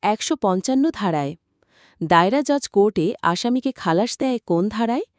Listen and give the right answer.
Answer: ২৬৫ জ ধারায়।